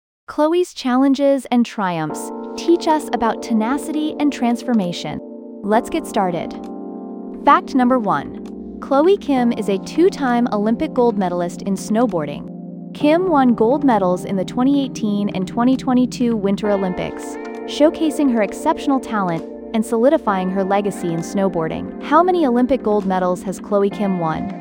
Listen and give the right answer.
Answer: Correct answer, 2.